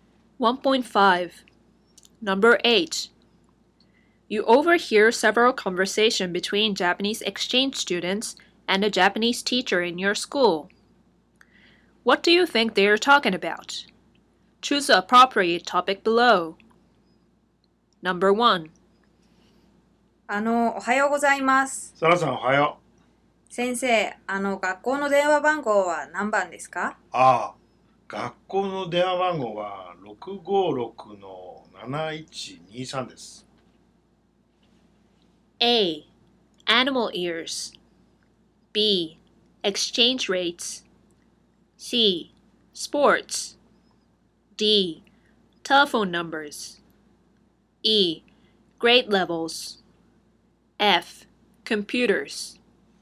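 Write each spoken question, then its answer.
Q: What do you think they are talking about?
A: D: Telephone numbers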